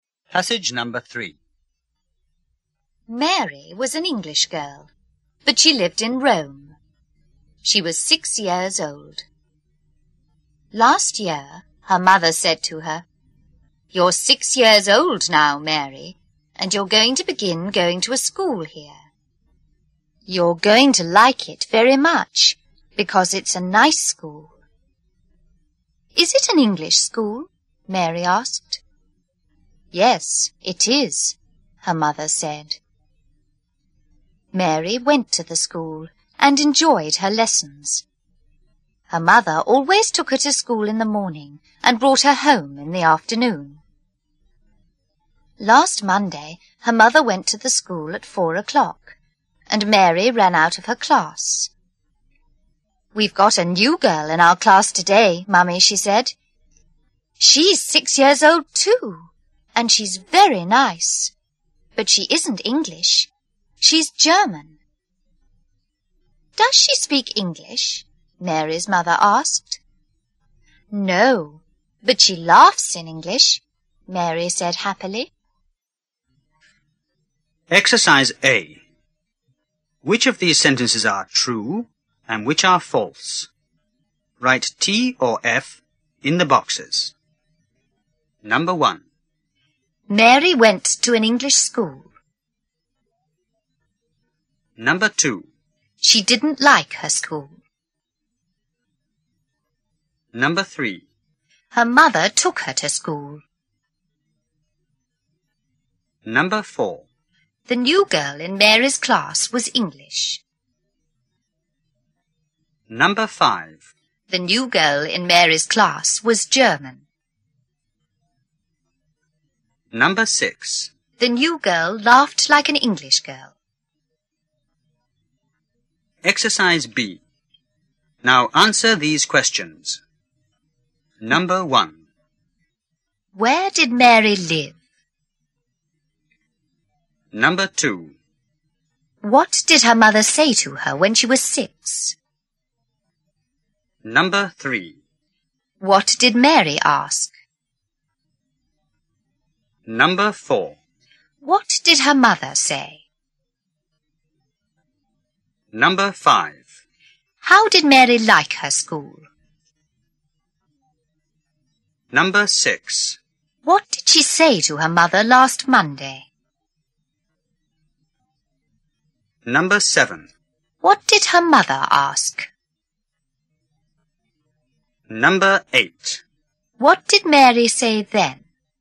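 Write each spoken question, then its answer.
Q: Mary went to an English school.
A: True

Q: She didn't like her school.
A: False

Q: Her mother took her to school.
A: True

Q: The new girl in Mary's class was English.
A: False

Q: The new girl in Mary's class was German.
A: True

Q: The new girl laughed like an English girl.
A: True

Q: Where did Mary live?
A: In Rome

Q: What did her mother say to her when she was 6?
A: That she was going to begin going to a nice school there and would like it

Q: What did Mary ask?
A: Is it an English school?

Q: What did her mother say?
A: Yes, it is

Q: How did Mary like her school?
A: She enjoyed it

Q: What did she say to her mother last Monday?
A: There was a new girl in her class, 6 years old, very nice, German

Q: What did her mother ask?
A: Does she speak English?

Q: What did Mary say then?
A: No, but she laughs in English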